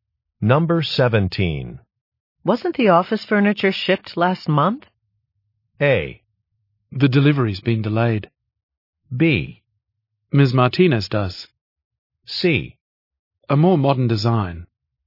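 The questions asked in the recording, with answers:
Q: Wasn't the office furniture shipped last month?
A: A: The delivery's been delayed.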